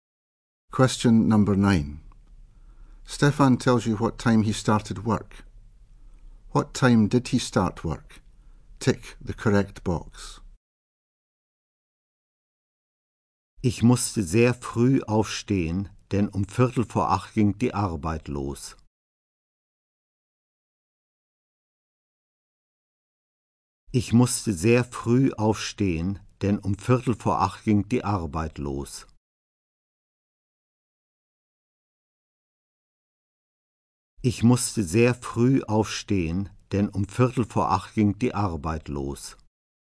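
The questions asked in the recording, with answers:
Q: What time did he start work?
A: 7:45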